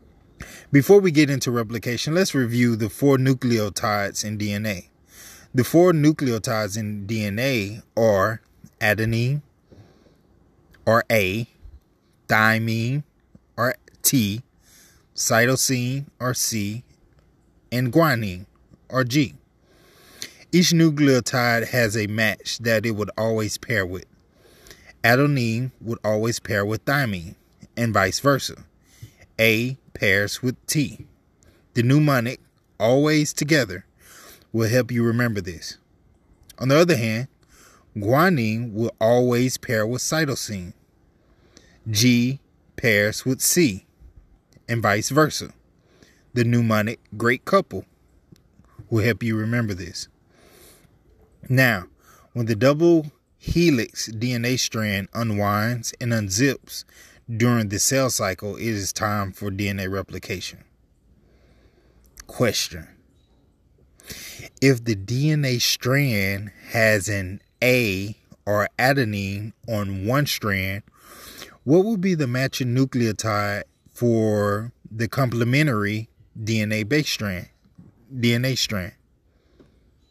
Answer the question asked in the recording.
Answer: If you chose thymine, thymine is the correct answer.